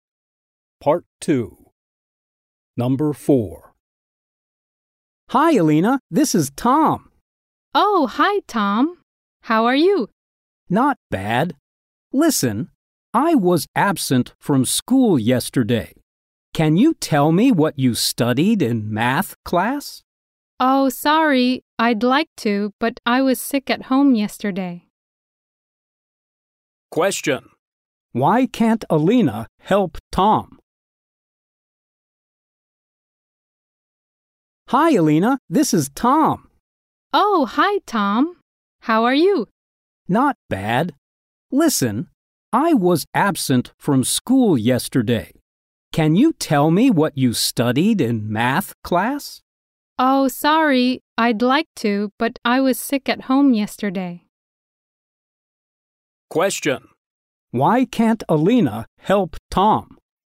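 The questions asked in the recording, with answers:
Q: Why can't Alina help Tom?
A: She was sick at home yesterday too.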